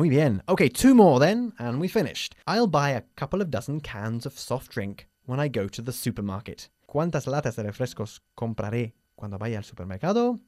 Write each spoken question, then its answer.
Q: ¿Cuántas latas de refrescos compraré cuando vaya al supermercado?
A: 24.